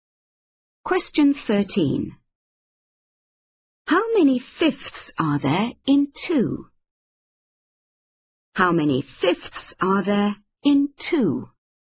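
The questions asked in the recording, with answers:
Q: How many fifths are there in 2?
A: 10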